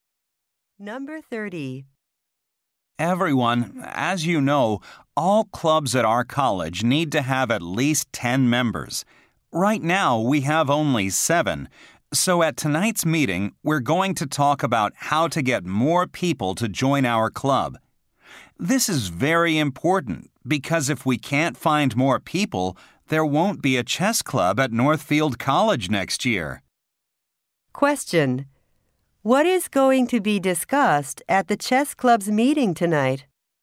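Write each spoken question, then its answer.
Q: Question: What is going to be discussed at the chess club's meeting tonight?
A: How to get more people to join the club.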